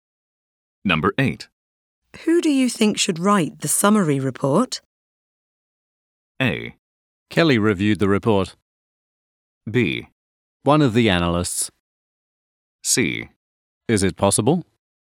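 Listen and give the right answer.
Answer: B: One of the analysts.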